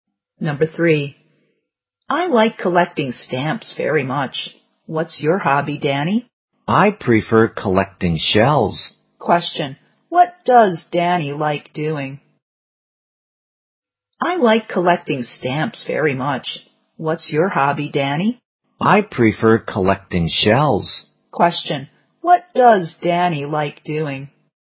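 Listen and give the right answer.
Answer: Collecting shells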